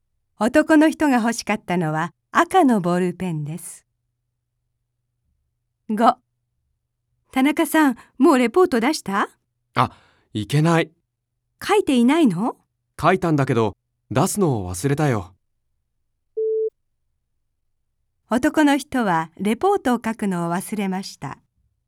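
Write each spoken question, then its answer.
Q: 男の人はレポートを書くのを忘れました。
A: 正しくない(出すのを忘れた)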